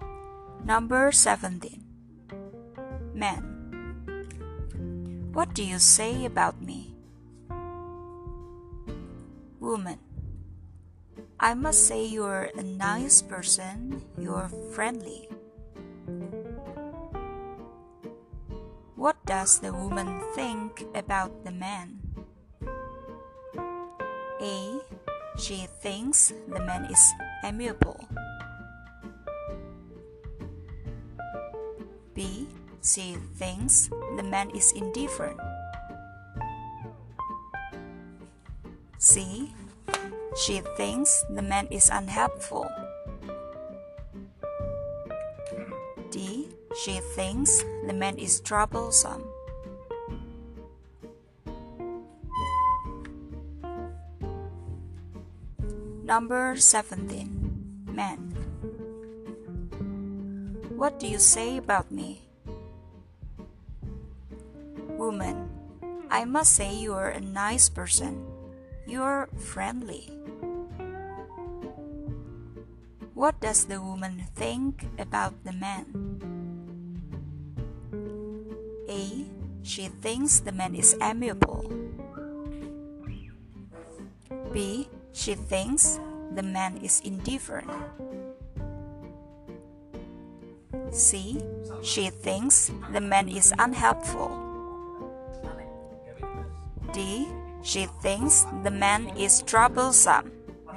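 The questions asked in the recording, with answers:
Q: What does the woman think about the man?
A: A: She thinks the man is amiable.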